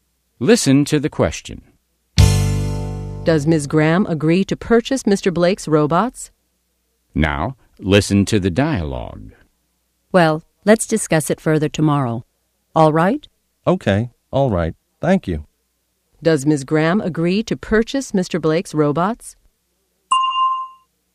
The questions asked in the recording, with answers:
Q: Does Ms. Graham agree to purchase Mr. Blake's robots?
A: No, she doesn't. She says they will discuss it again tomorrow.